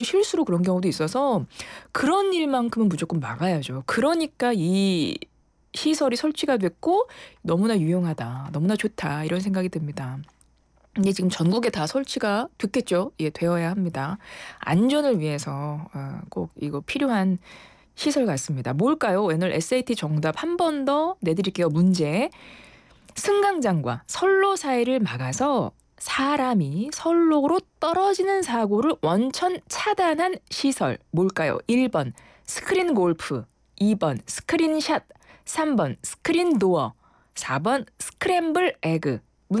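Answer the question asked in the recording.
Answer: 3: 스크린 도어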